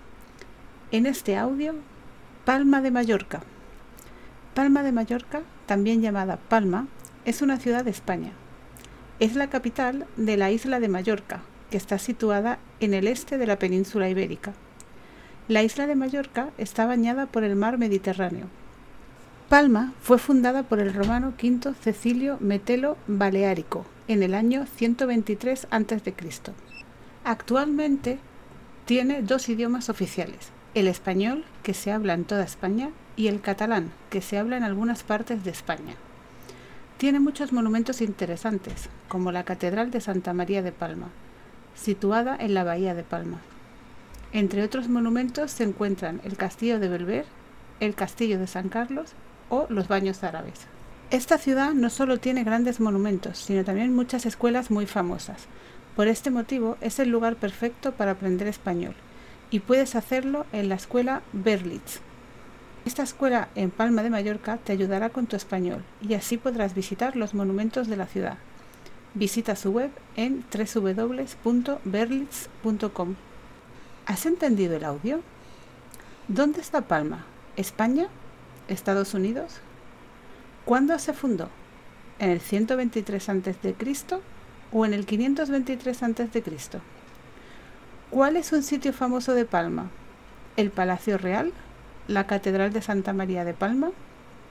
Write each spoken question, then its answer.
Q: ¿Dónde está Palma?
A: España

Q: ¿Cuándo se fundó?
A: 123 a.C.

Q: ¿Cuál es un sitio famoso de Palma?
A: y la Catedral de Santa María de Palma.